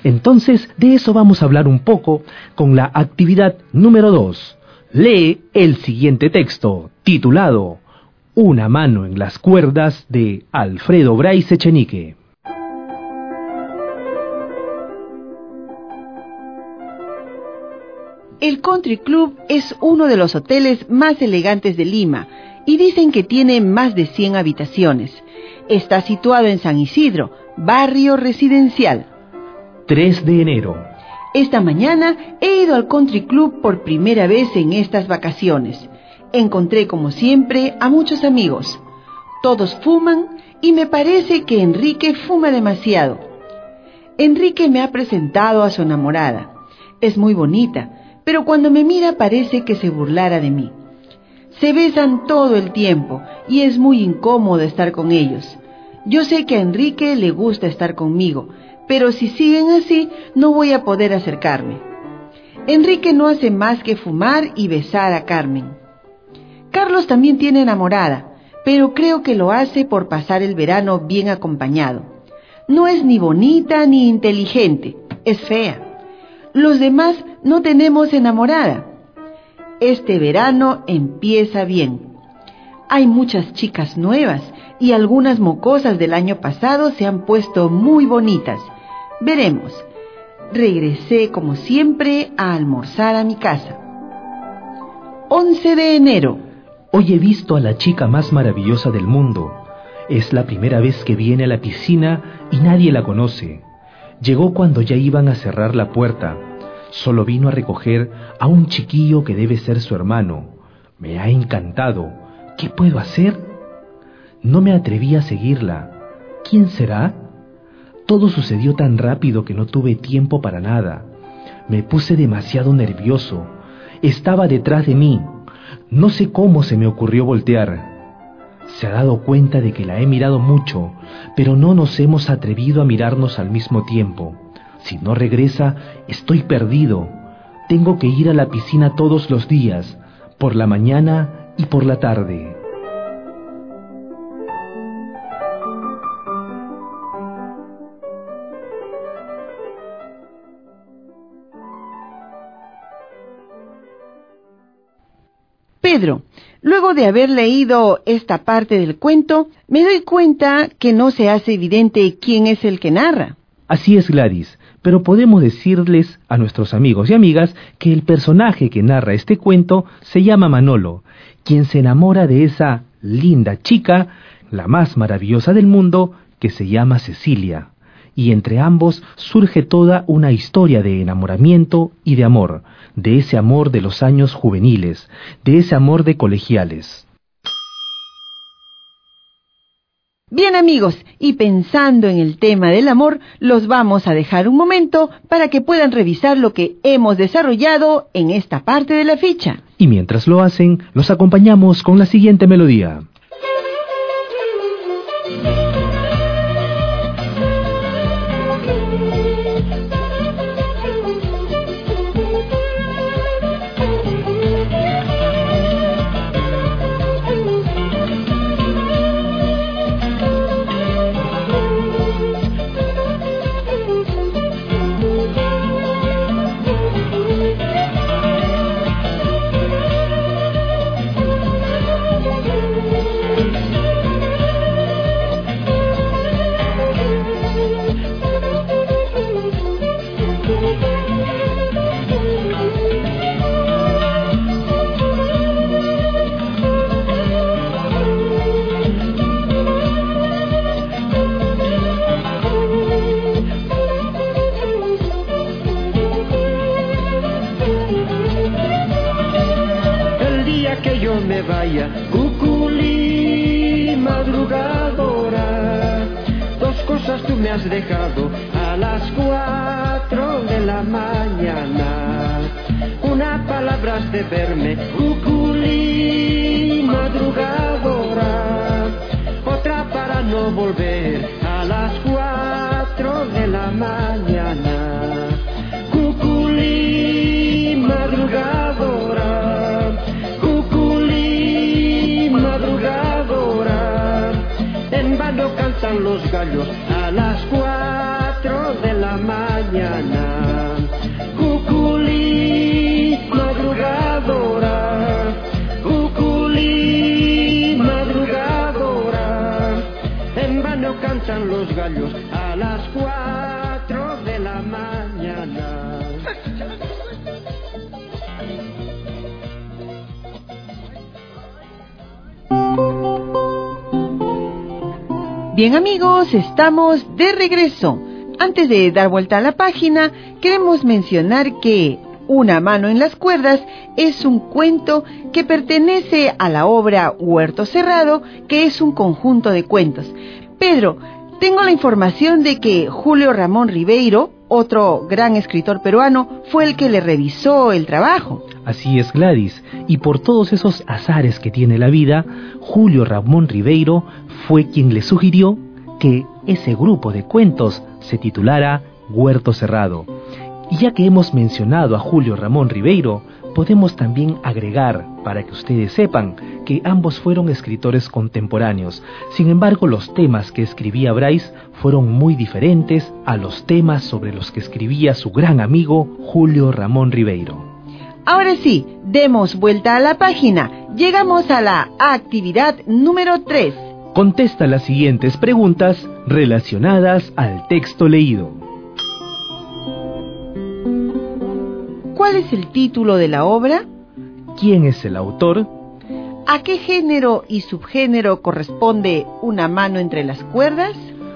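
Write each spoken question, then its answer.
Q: ¿Cuál es el título de la obra?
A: Una mano en las cuerdas

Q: ¿Quién es el autor?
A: Alfredo Bryce Echenique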